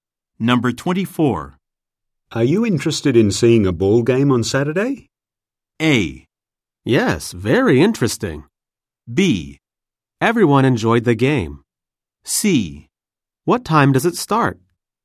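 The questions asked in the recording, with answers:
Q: Are you interested in seeing a ball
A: C: What time does it start?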